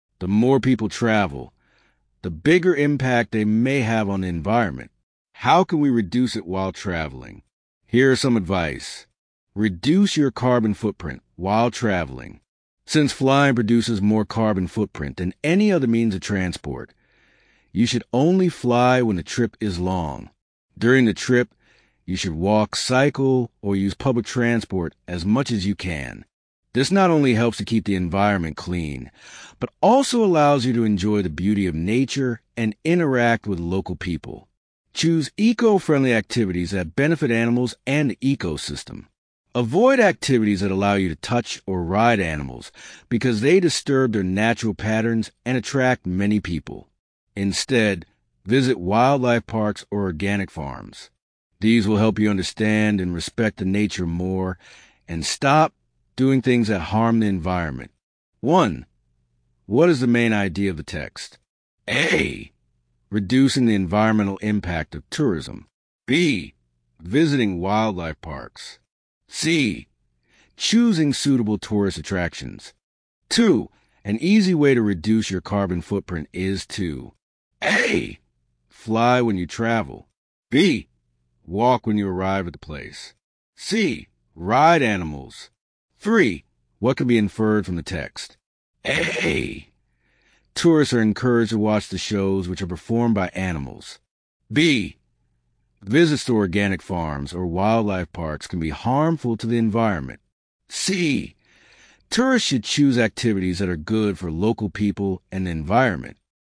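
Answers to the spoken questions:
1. A: Reducing the environmental impact of tourism.
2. B: Walk when you arrive at the place.
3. C: Tourists should choose activities that are good for local people and the environment.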